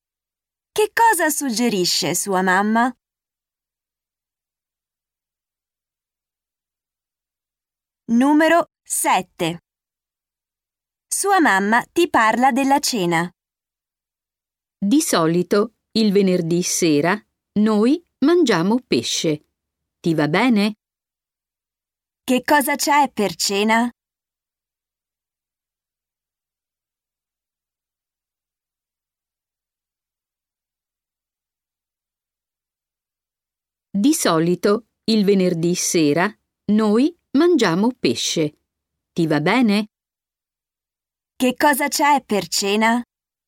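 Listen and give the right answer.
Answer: Pesce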